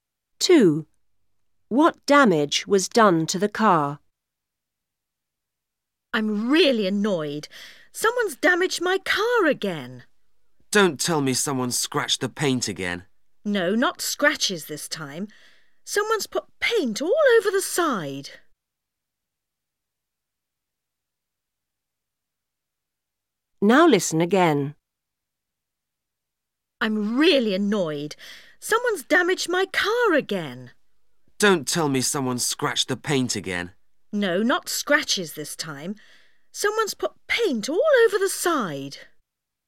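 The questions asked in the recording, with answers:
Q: What damage was done to the car?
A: Someone put paint all over the side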